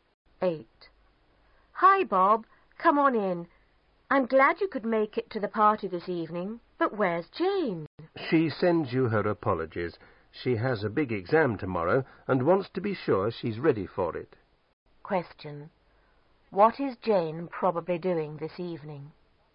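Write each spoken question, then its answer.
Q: What is Jane probably doing this evening?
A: Studying for an exam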